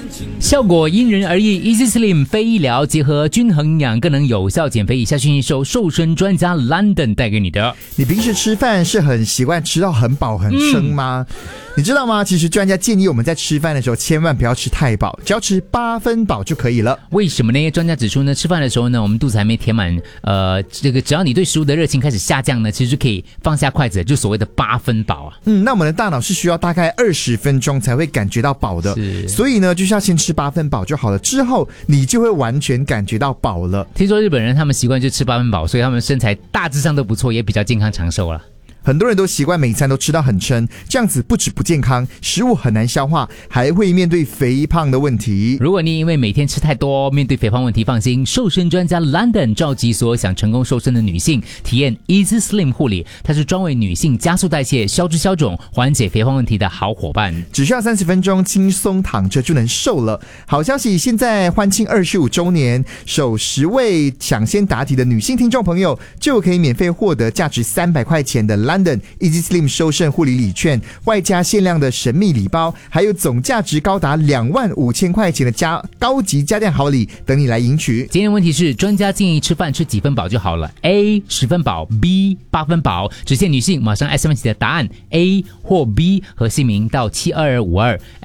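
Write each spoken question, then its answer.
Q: 今天问题是,专家建议吃饭吃几分饱就好了? A 10分饱, B 8分饱。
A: B: 8分饱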